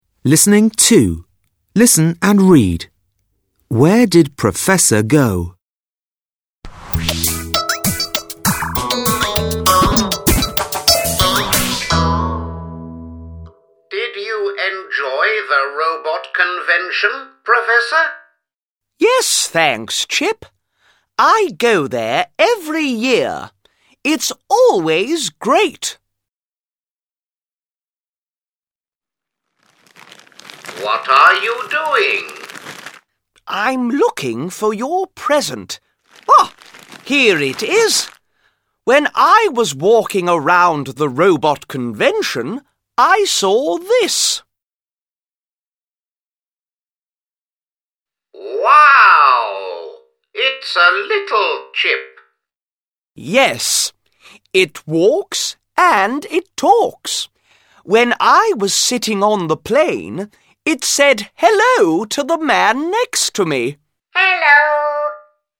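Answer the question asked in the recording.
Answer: To the robot convention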